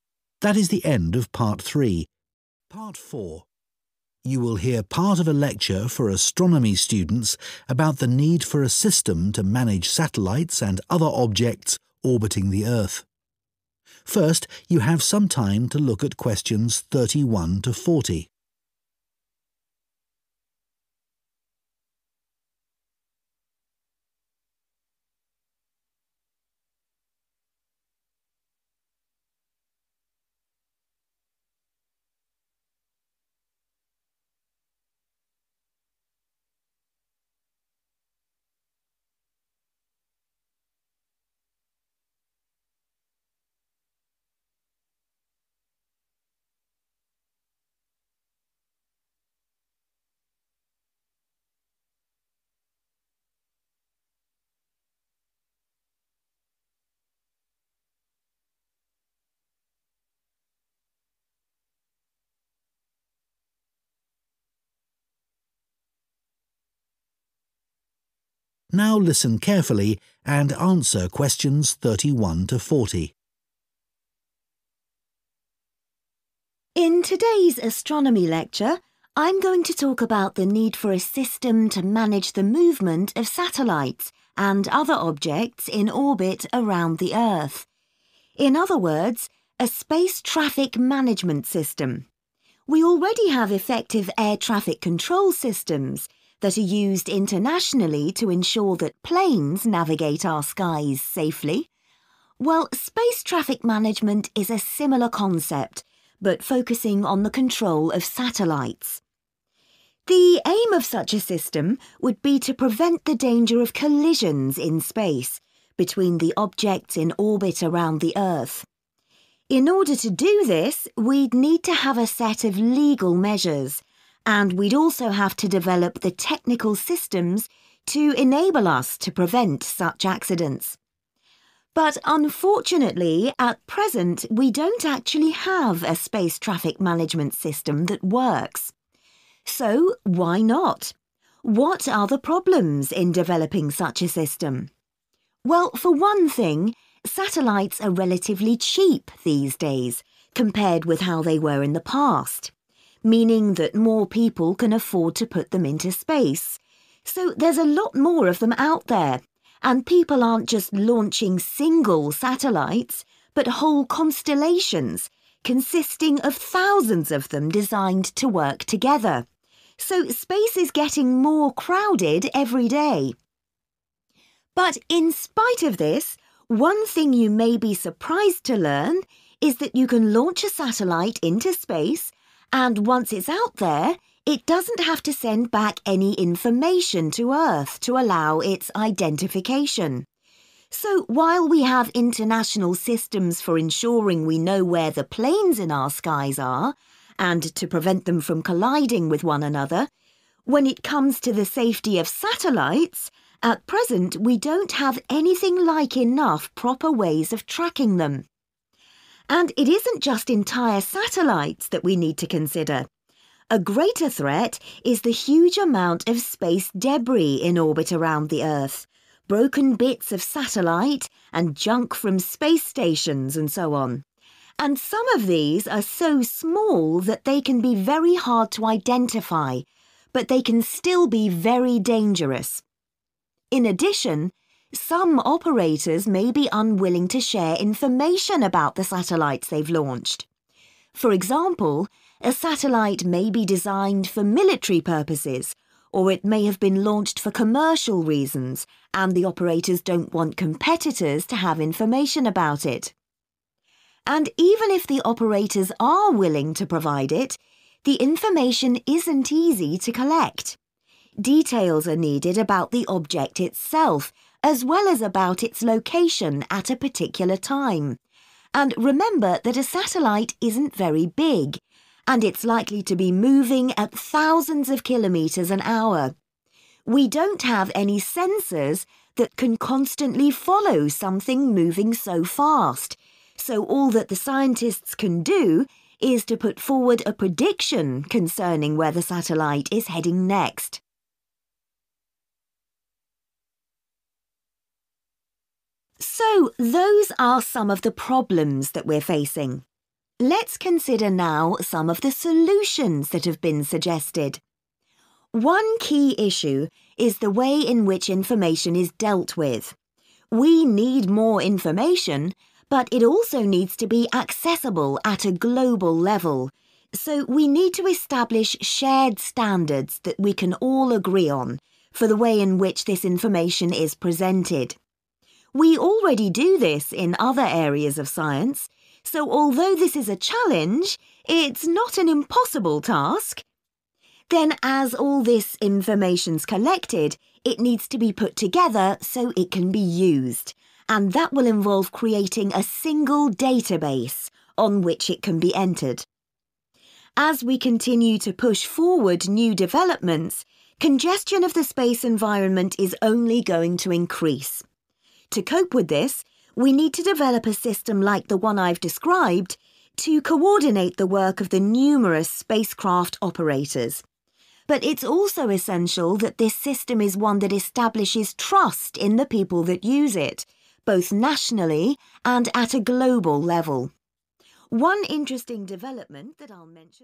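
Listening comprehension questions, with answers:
Complete the notes below.Write ONE WORD ONLY for each answer.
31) would aim to set up legal and 31...... ways of improving safety.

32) Satellites are now quite 32.... and therefore more widespread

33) (e.g. there are constellations made up of 33..... of satellites).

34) At present, satellites are not required to transmit information to help with their 34....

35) There are few systems for 35.... satellites.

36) Operators may be unwilling to share details of satellites used for 36.... or commercial reasons.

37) It may be hard to collect details of the object's 37.... at a given time.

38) Scientists can only make a 38.... about where the satellite will go.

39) The information should be combined in one 39...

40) A coordinated system must be designed to create 40.... in its users.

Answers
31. technical
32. cheap
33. thousands
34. identification
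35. tracking
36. military
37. location
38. prediction
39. database
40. trust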